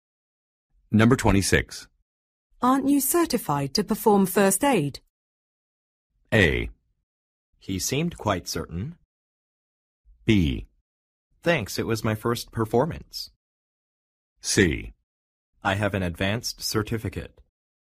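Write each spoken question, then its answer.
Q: Aren't you certified to perform first aid?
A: C: I have an advanced certificate.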